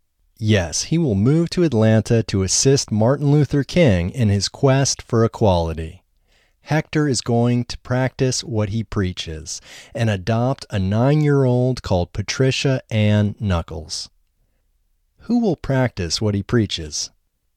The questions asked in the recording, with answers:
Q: Who will practice what he preaches?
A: Hector will practice what he preaches.